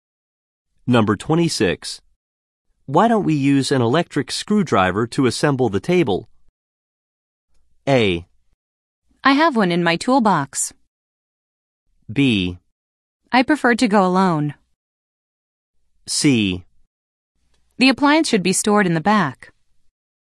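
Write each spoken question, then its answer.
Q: Why don't we use an electric screwdriver to assemble the table?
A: A: I have one in my toolbox.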